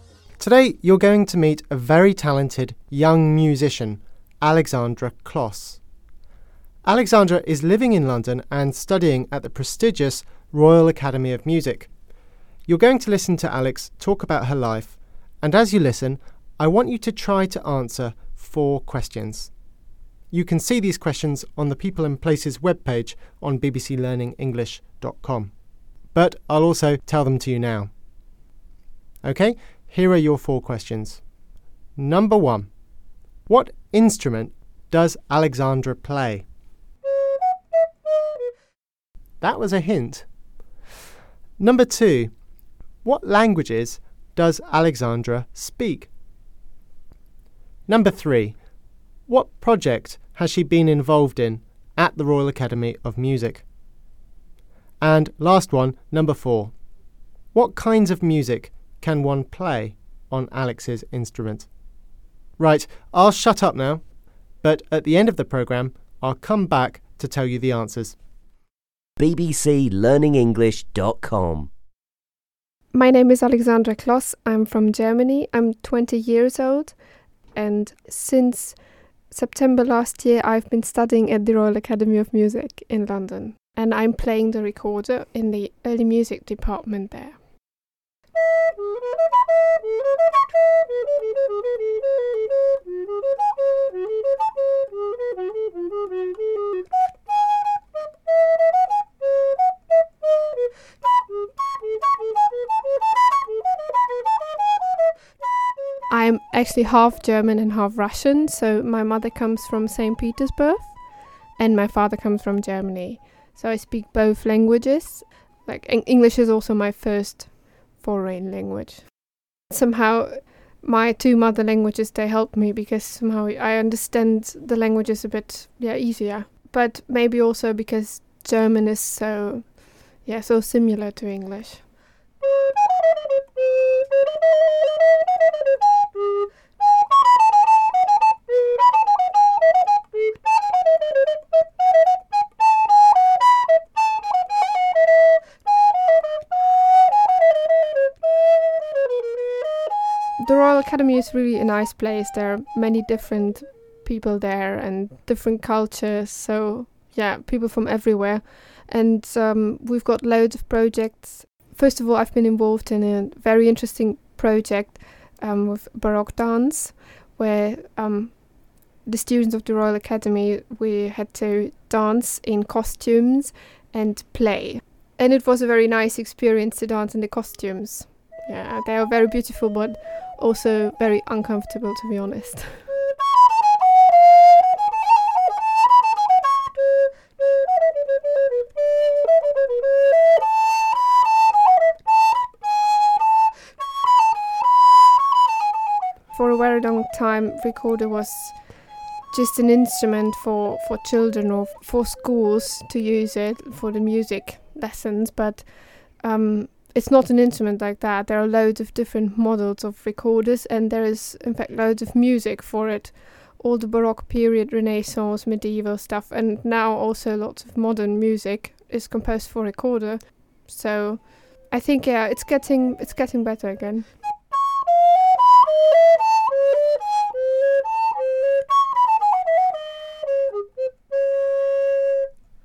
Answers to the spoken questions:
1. And she was playing them on the recorder, which was the answer to the first question.
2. Well, she is bilingual in Russian and German because her mother comes from Russia and her father from Germany.
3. Well, she said she had to dance wearing costumes, so clothes from the Baroque period.
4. Alexandra said that there was loads of music for it, including Baroque music, Renaissance music, and medieval music.